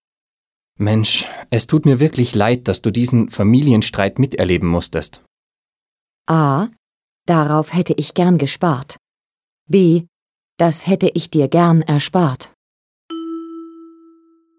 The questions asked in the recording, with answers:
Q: Mensch, es tut mir wirklich leid, dass du diesen Familienstreit miterleben musstest.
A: B ist richtig.